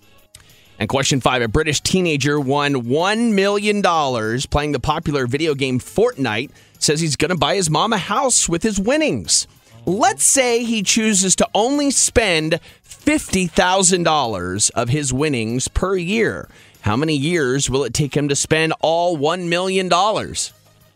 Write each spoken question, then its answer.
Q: How many years will it take him to spend all $1 million?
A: 20 years.